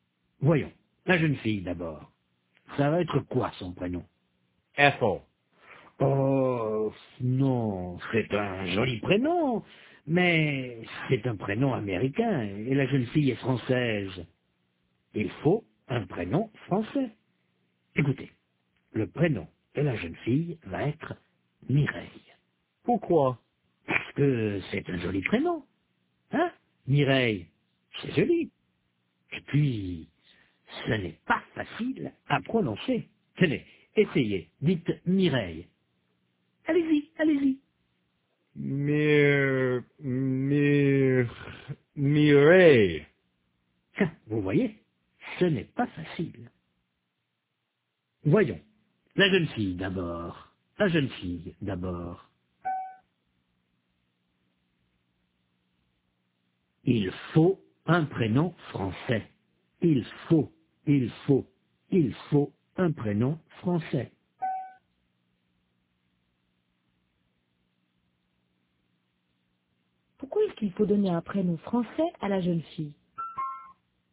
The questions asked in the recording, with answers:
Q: Pourquoi est-ce qu'il faut donner un prénom français à la jeune fille?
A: Parce qu'elle est française.